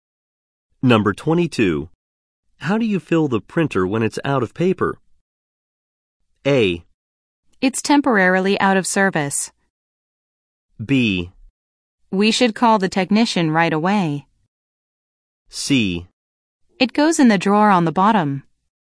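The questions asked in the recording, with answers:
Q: How do you fill the printer when it's out of paper?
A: C: It goes in the drawer on the bottom.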